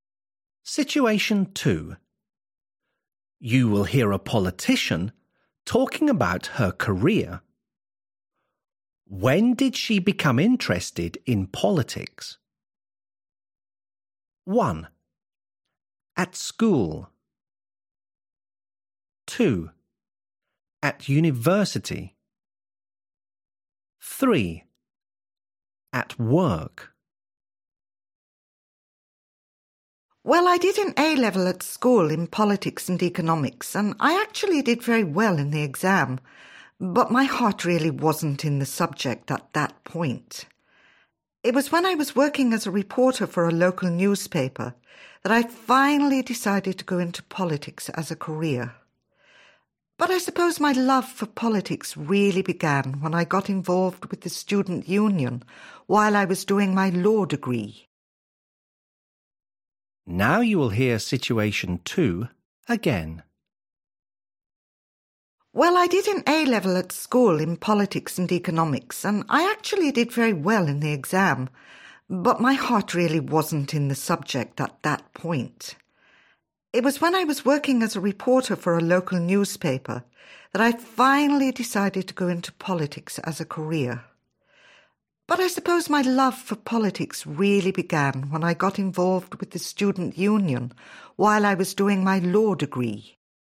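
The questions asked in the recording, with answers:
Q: When did she become interested in politics?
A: 2: At university.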